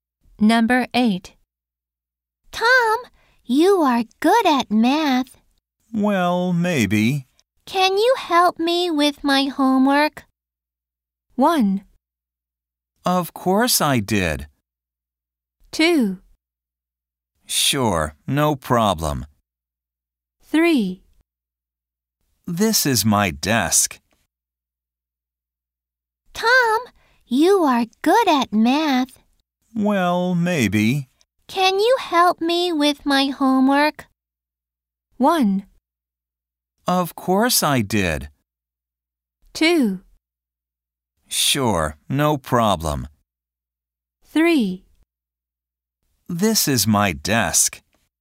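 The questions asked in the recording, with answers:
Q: Can you help me with my homework?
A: 2: Sure, no problem.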